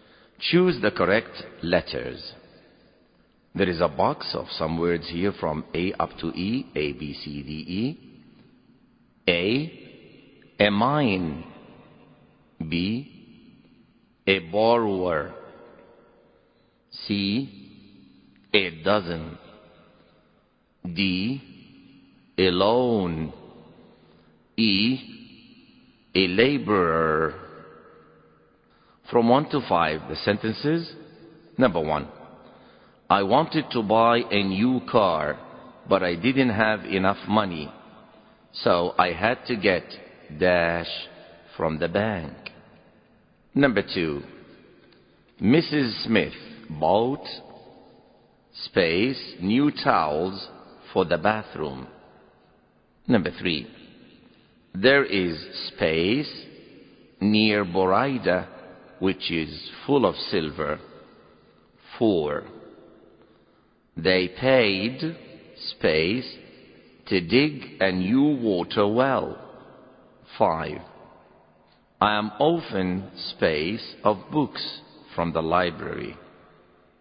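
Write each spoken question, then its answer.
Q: I wanted to buy a new car, but I didn't have enough money. So I had to get dash from the bank.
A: D: a loan

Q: Mrs. Smith bought space new towels for the bathroom.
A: C: a dozen

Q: There is space near Boraida, which is full of silver.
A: A: a mine

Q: They paid space to dig a new water well.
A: E: a laborer

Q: I am often space of books from the library.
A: B: a borrower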